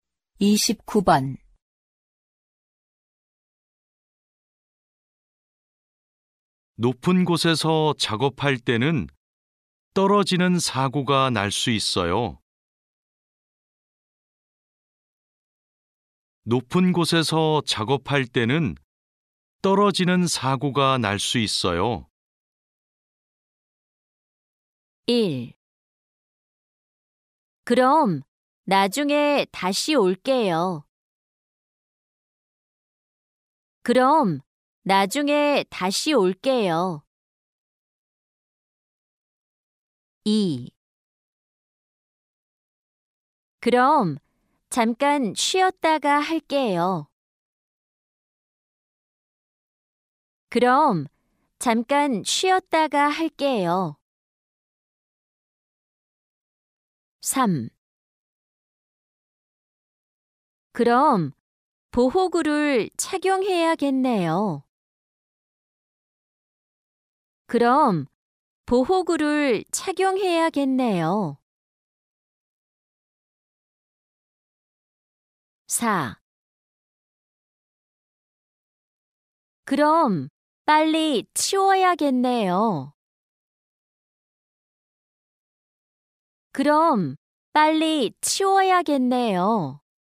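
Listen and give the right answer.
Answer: 3: 그럼 보호구를 착용해야겠네요.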